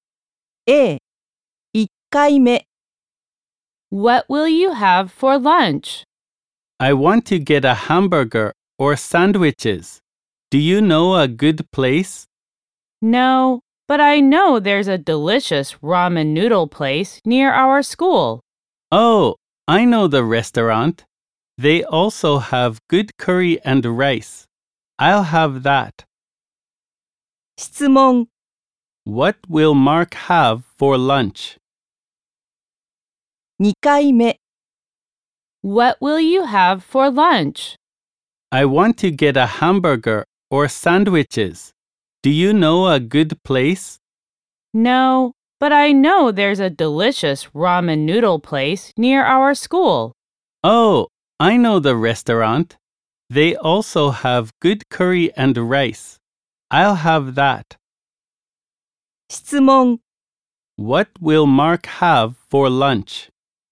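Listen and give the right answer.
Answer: Curry and rice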